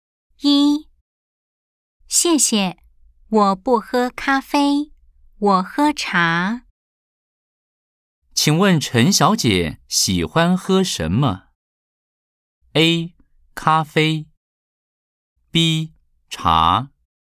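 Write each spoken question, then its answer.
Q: 请问陈小姐喜欢喝什么?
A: B: 茶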